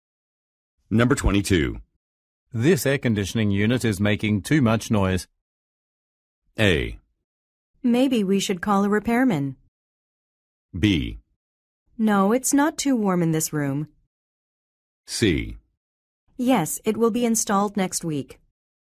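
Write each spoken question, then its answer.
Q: This air conditioning unit is making too much noise.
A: A: Maybe we should call a repairman.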